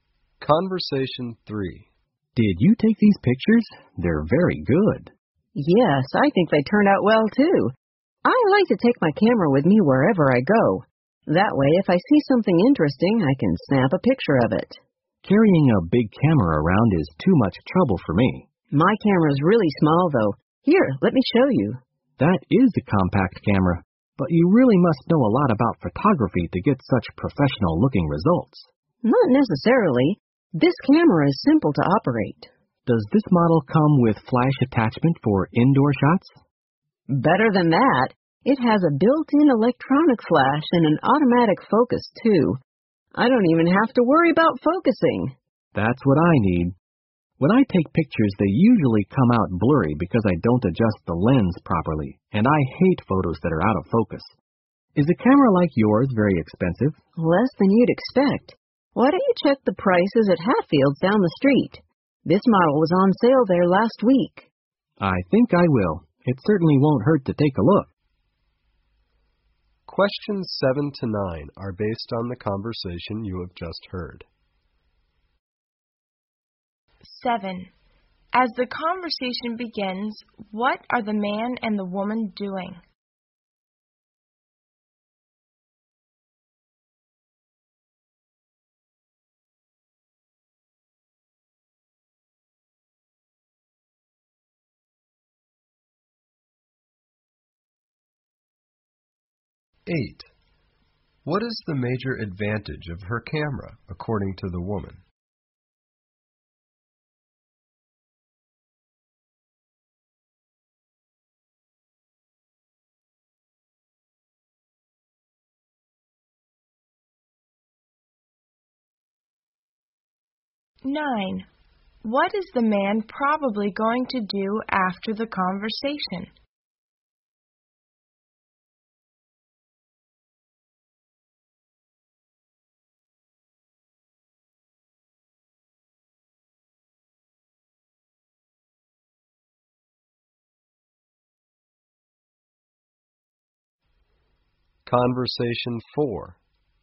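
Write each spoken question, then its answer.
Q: As the conversation begins, what are the man and the woman doing?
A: Looking at the woman's photos

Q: What is the man probably going to do after the conversation?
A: Check camera prices at Hatfield's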